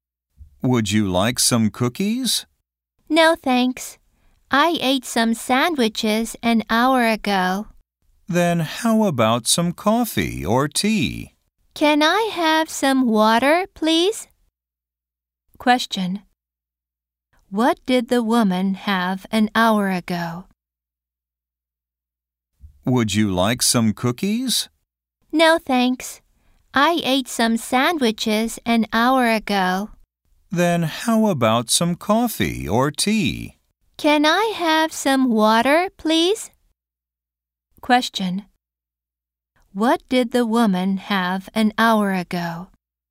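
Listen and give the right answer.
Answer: Some sandwiches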